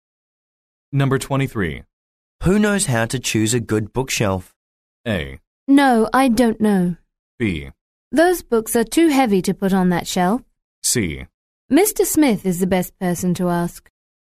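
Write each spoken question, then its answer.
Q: Who knows how to choose a good bookshelf?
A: C: Mr. Smith is the best person to ask.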